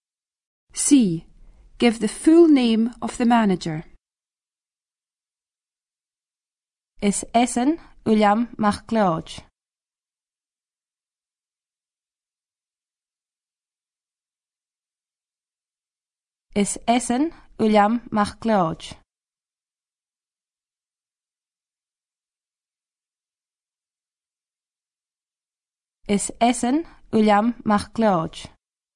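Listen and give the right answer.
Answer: William MacLeod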